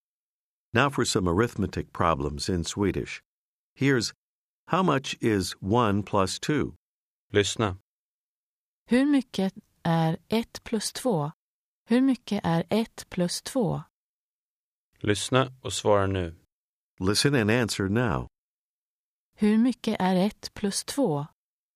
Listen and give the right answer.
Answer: 3. 3.